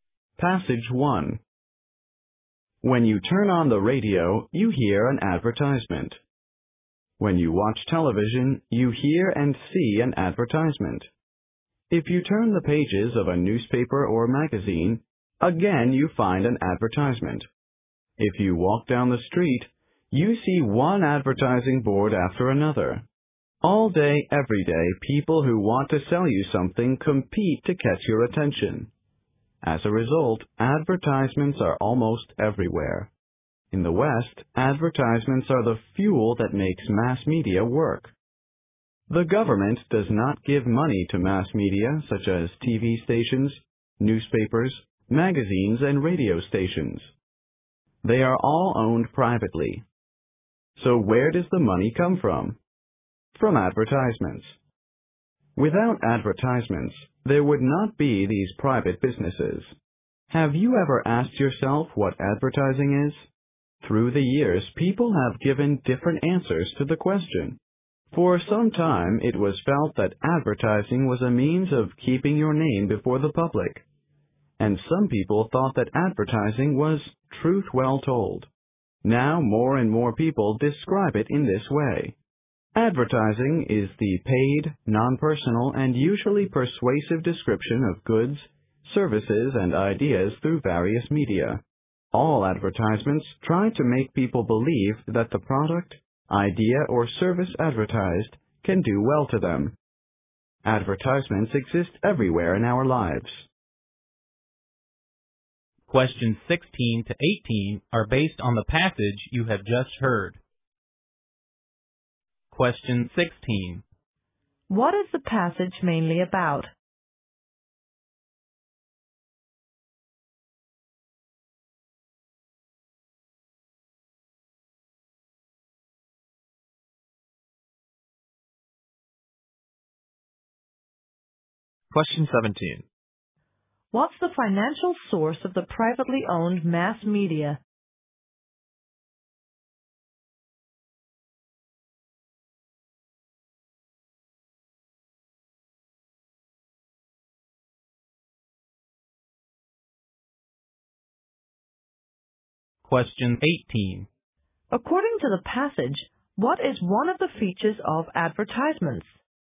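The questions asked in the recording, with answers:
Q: What is the passage mainly about?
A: Advertising

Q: What's the financial source of the privately owned mass media?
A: Advertisements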